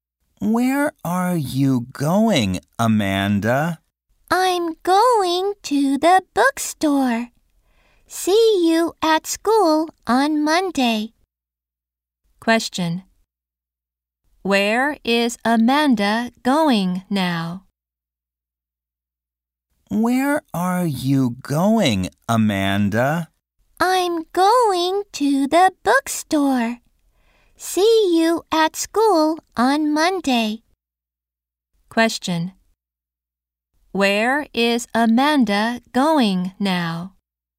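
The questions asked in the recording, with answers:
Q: Where is Amanda going now?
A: To the bookstore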